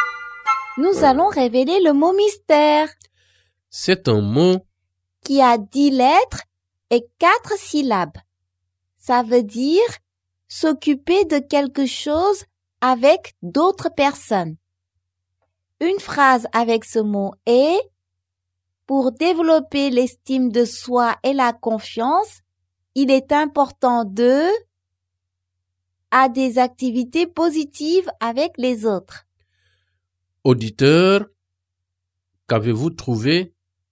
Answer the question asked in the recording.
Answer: Le mot mystère est participer.